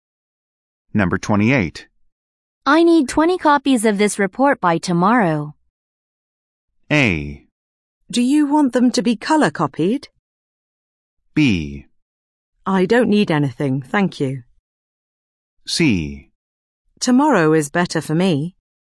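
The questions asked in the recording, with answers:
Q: I need 20 copies of this report by tomorrow.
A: A: Do you want them to be color copied?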